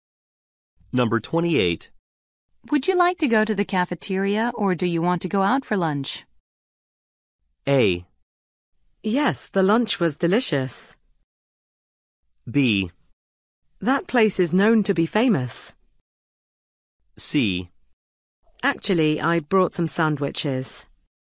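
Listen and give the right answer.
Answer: C: Actually, I brought some sandwiches.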